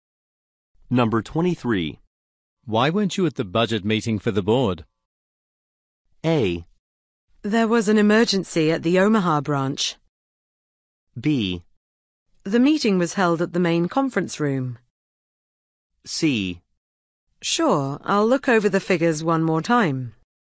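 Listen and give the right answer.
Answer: A: There was an emergency at the Omaha branch.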